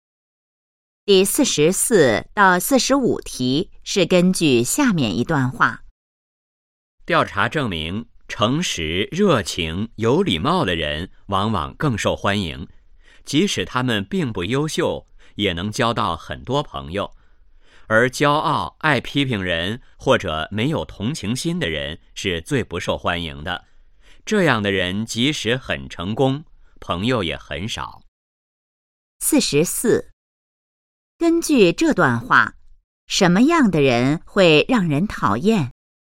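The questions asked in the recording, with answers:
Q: 根据这段话,什么样的人会让人讨厌?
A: 骄傲、爱批评人或者没有同情心的人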